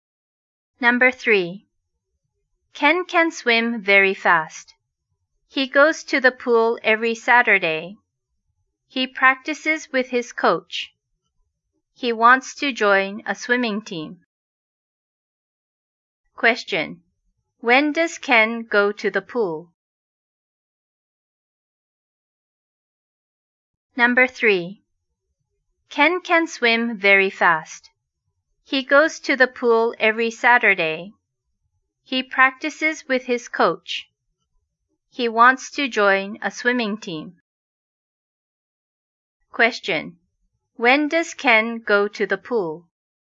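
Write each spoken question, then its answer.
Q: When does Ken go to the pool?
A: Every Saturday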